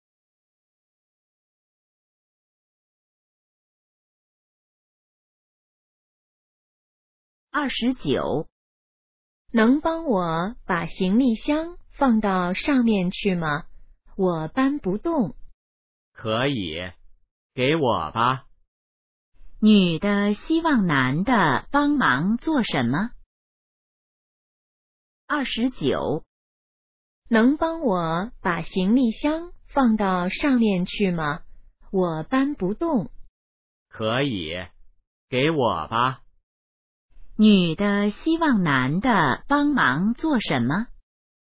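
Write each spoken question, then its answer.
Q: 女的希望男的帮忙做什么?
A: 把行李箱放到上面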